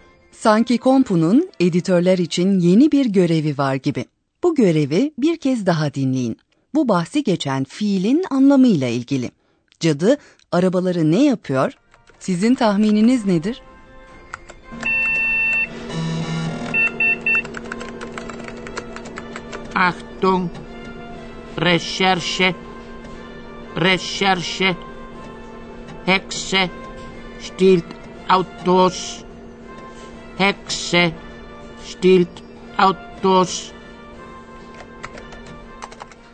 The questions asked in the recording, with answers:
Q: Cadı arabaları ne yapıyor?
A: Birisi arabaları çalmak için karnaval giysileri kullanıyor.